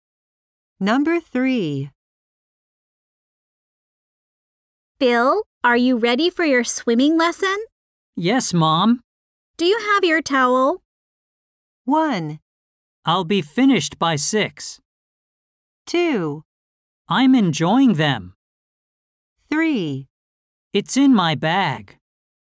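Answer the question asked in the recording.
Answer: 3: It's in my bag.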